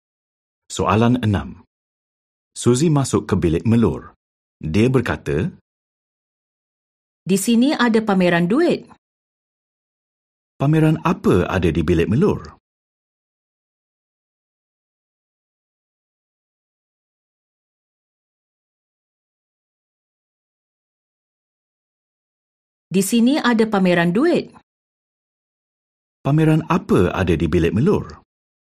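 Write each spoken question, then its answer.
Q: Pameran apa ada di bilik melur?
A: Pameran duit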